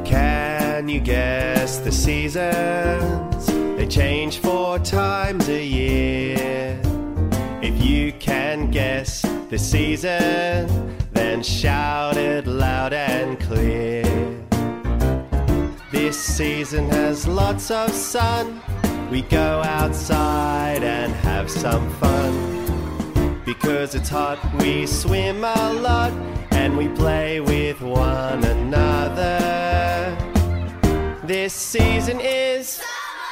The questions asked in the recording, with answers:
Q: This season is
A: summer.